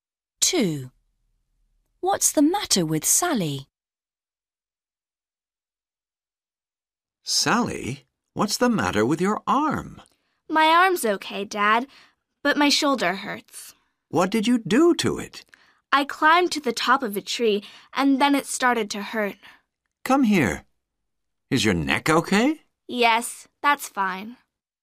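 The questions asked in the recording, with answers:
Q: What's the matter with Sally?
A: Her shoulder hurts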